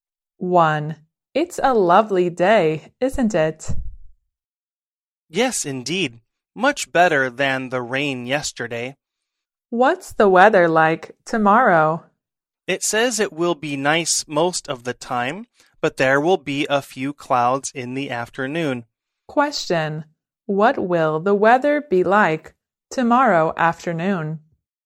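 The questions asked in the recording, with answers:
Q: What will the weather be like tomorrow afternoon?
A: A little cloudy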